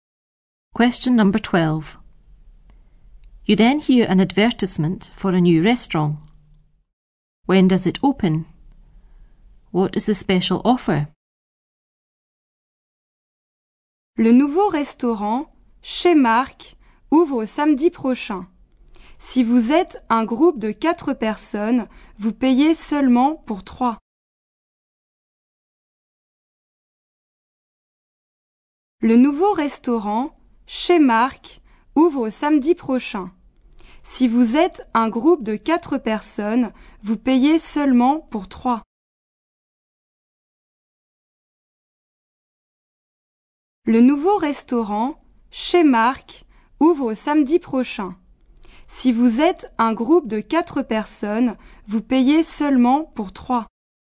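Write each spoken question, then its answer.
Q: When does it open?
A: Next Saturday

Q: What is the special offer?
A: A group of 4 pays for only 3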